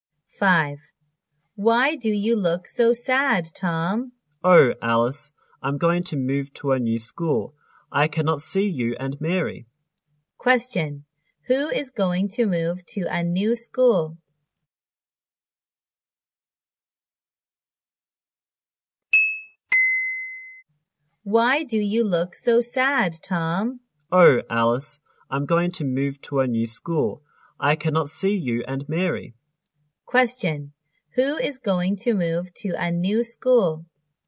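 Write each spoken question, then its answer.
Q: Who is going to move to a new school?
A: Tom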